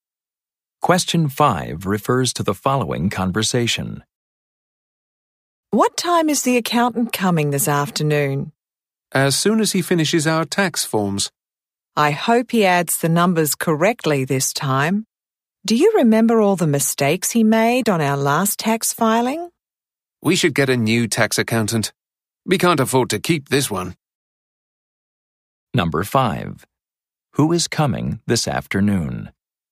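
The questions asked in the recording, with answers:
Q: Who is coming this afternoon?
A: The tax accountant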